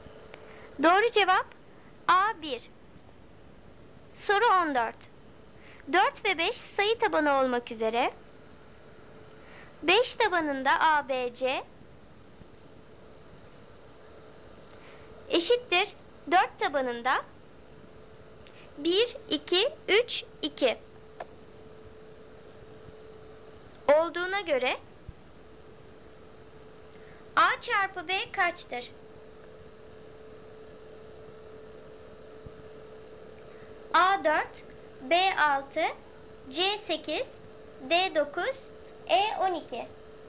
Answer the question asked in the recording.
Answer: Doğru cevap C 8.